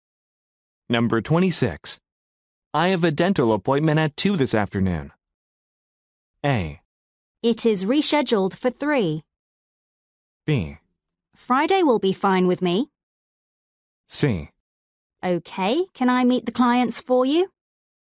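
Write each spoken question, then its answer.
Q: I have a dental appointment at 2 this afternoon.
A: C: Okay, can I meet the clients for you?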